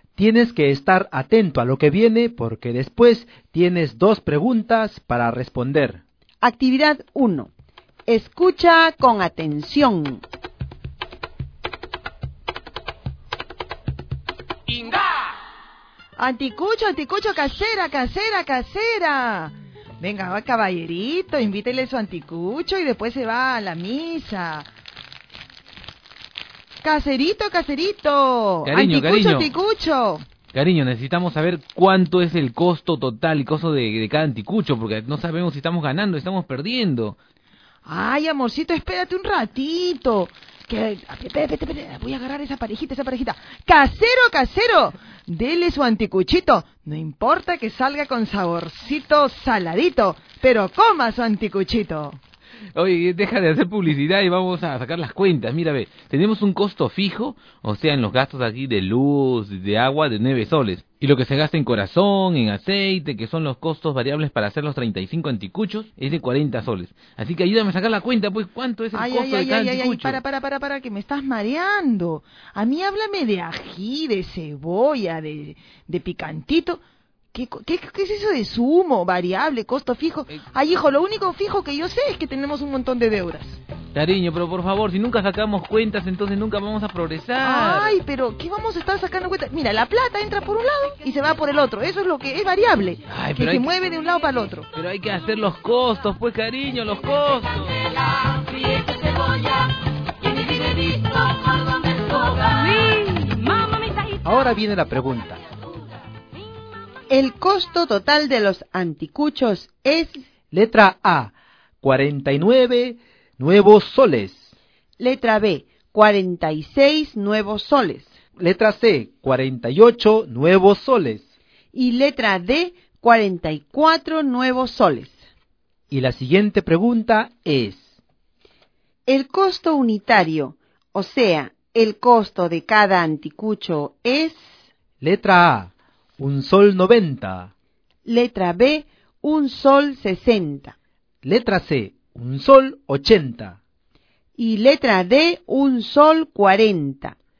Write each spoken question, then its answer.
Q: El costo unitario, o sea, el costo de cada anticucho es...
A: 1 sol 40, ¿no es así?